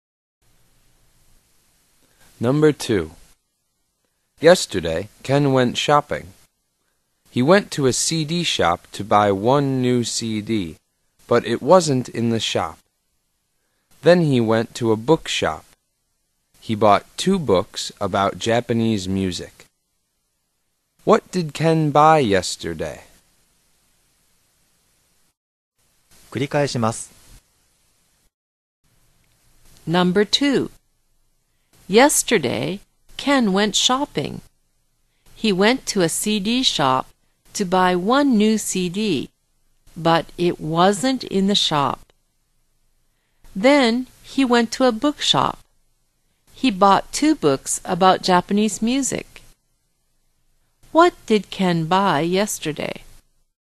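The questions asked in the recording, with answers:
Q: What did Ken buy yesterday?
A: Two books about Japanese music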